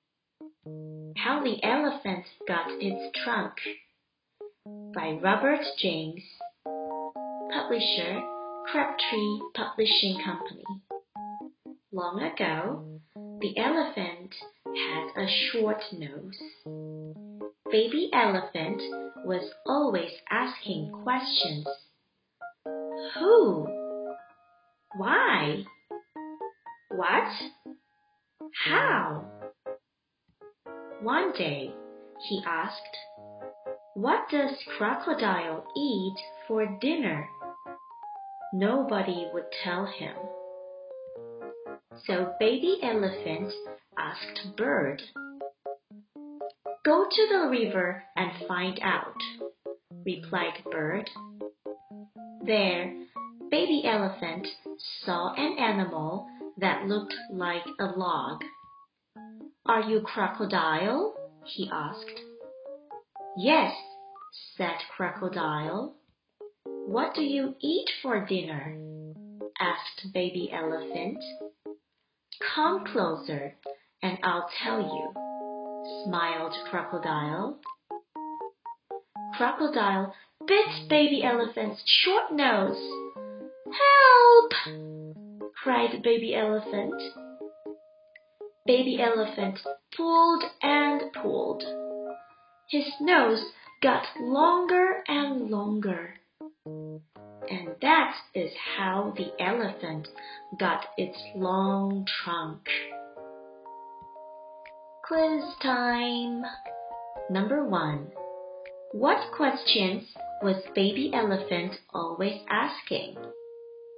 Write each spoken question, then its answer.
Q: What questions was baby elephant always asking?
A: Who why? What? How?